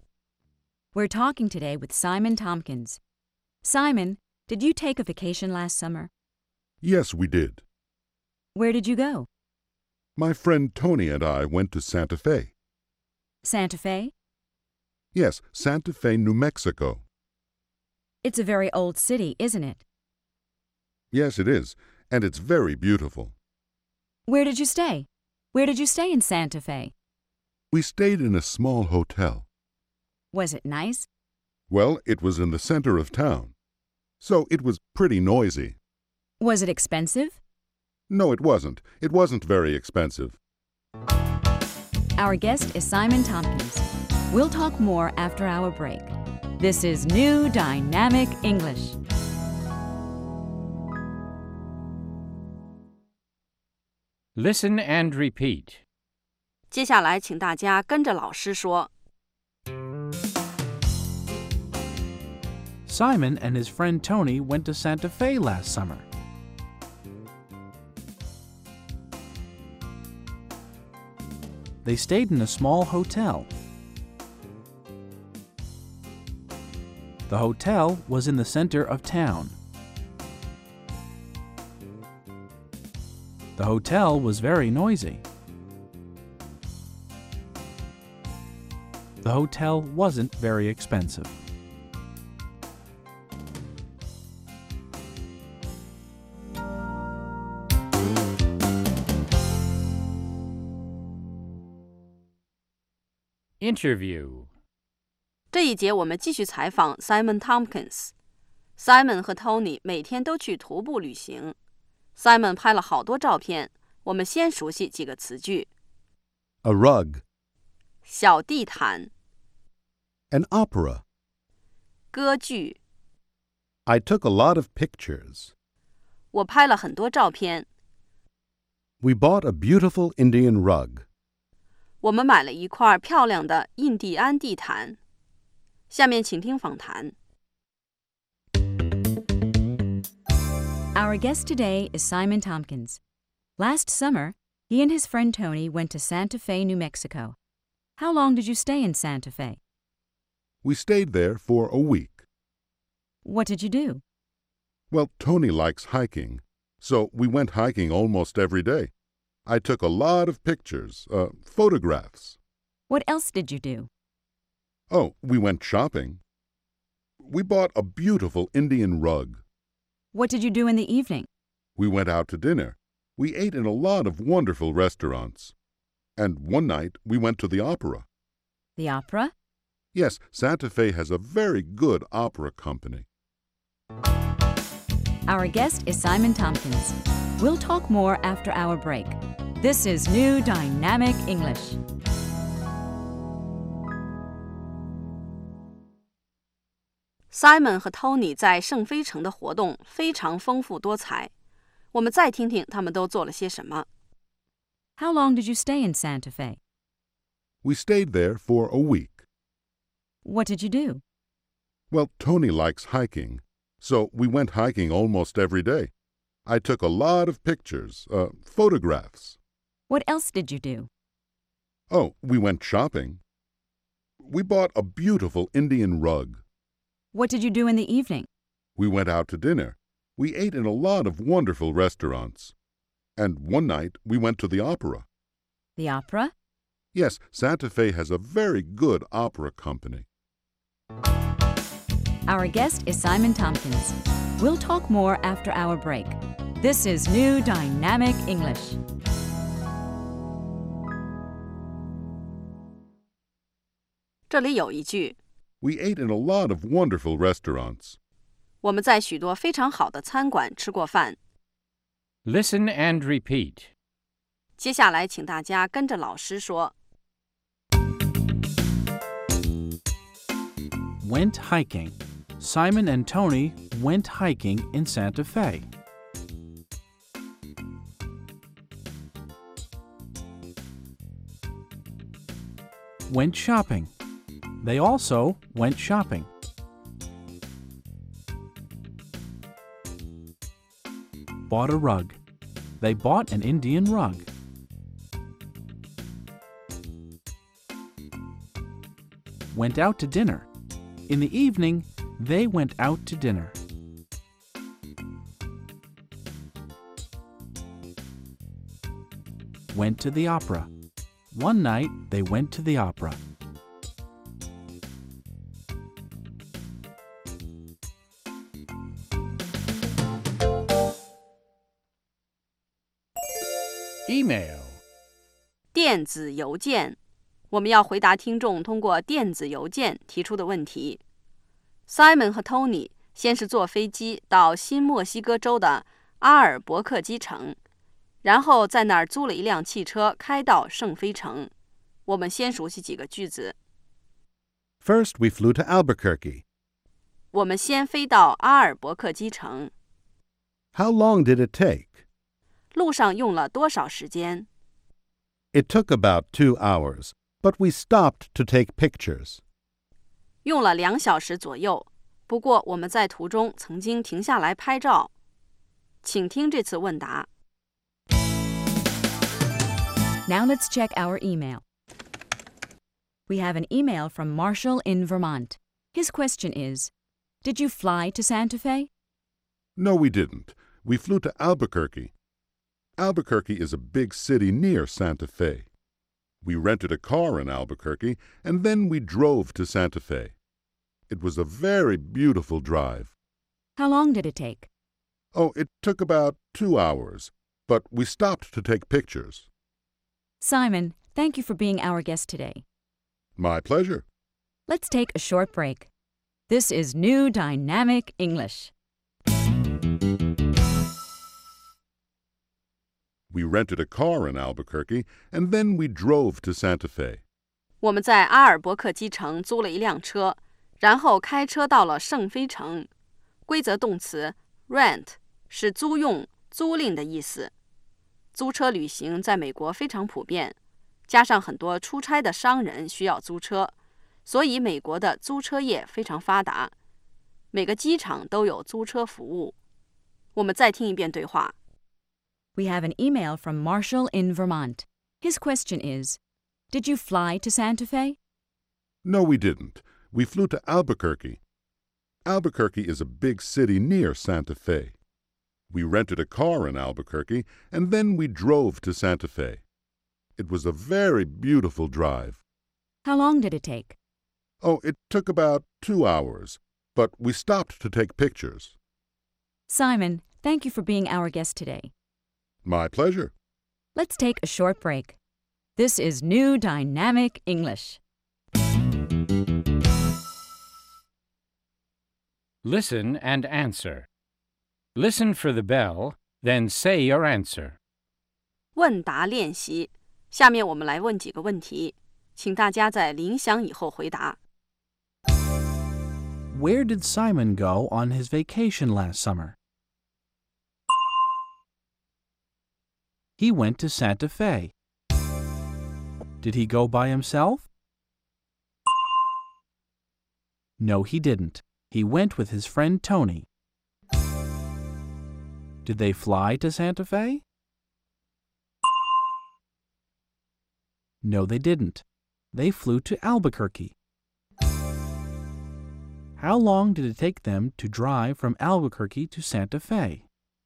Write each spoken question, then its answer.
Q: Where did Simon go on his vacation last summer?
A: He went to Santa Fe.

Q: Did he go by himself?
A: No, he didn't. He went with his friend Tony.

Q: How long did it take them to drive from Albuquerque to Santa Fe?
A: It took them 2 hours.